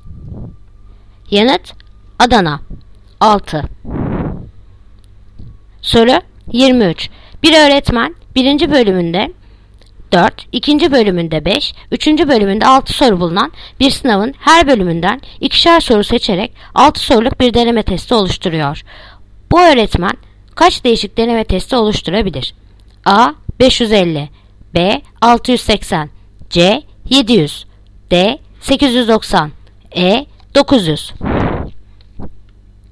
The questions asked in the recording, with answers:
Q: Bu öğretmen kaç değişik deneme testi oluşturabilir?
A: Yanıt Edirne 900.